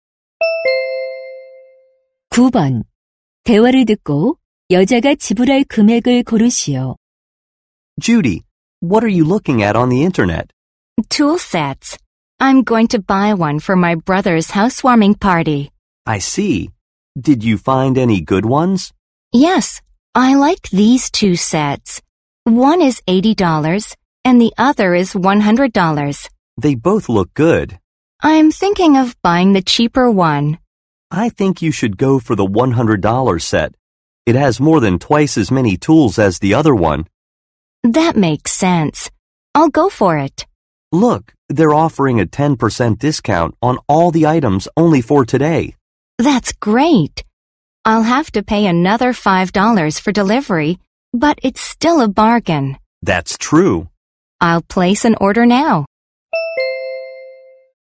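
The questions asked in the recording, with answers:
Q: 대화를 듣고 여자가 지불할 금액을 고르시오.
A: $95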